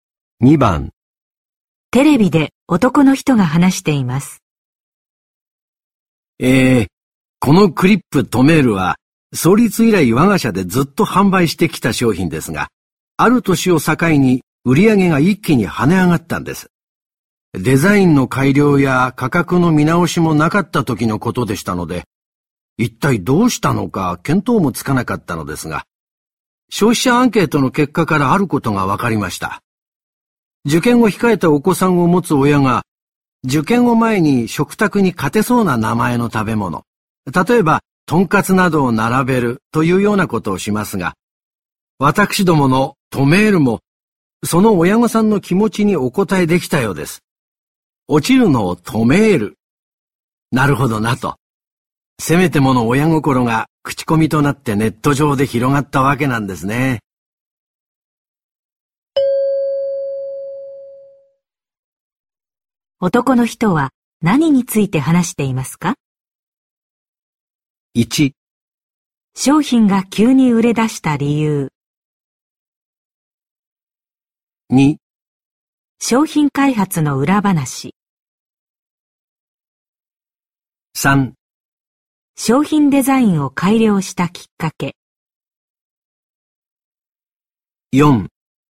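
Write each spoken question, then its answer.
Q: 男の人は何について話していますか?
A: 1: 商品が急に売れ出した理由。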